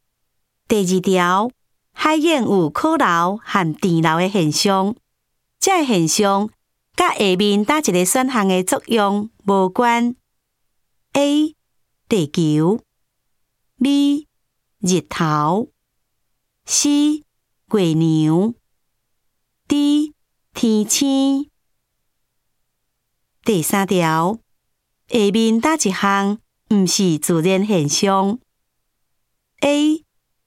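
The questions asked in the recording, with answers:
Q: 海燕有靠楼和电楼的现象,这现象甲下面哪一个选项的作用无关 ?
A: D: 天星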